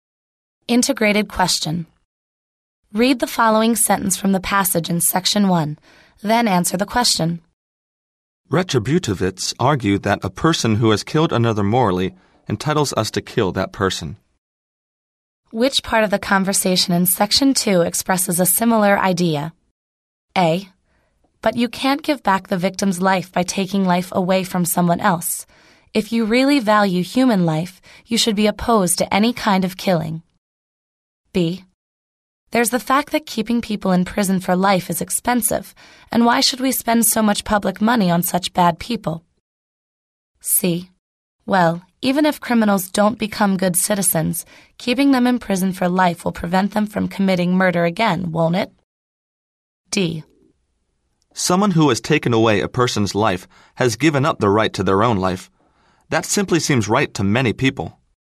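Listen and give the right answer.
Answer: D: Someone who has taken away a person's life has given up the right to their own life.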